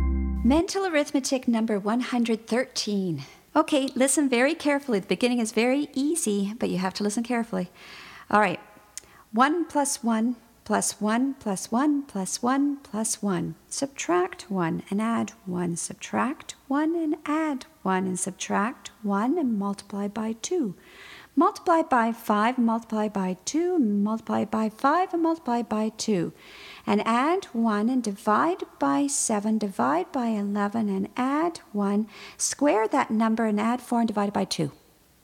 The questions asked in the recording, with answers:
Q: Square that number and add 4 and divide by 2.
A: And the answer is 100.